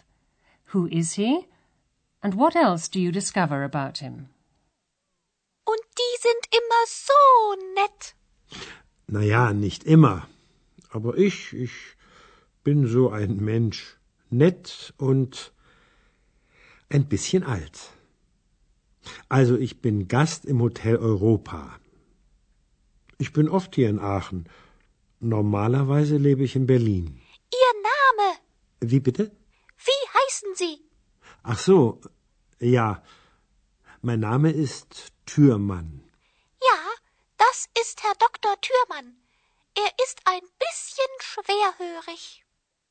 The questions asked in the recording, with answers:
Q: Who is he?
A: Dr. Thürmann says that he's a guest at the Hotel Europa.